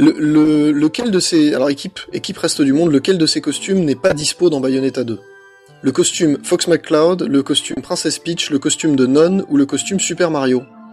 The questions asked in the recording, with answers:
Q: Alors, équipe reste du monde, lequel de ces costumes n'est pas dispo dans Bayonetta 2?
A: c'est Super Mario, c'est la bonne réponse